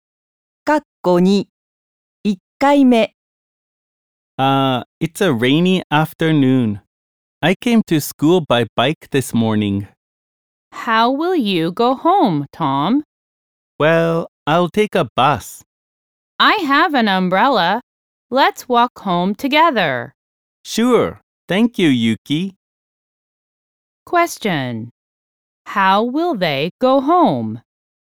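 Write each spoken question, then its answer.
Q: How will they go home?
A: They will walk home.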